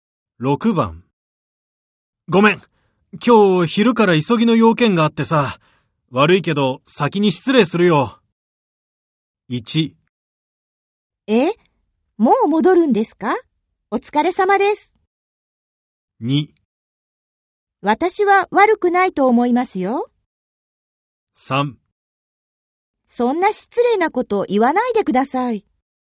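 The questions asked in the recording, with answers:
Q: ごめん。今日昼から急ぎの用件があってさ。悪いけど先に失礼するよ。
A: 1: え?もう戻るんですか?お疲れ様です。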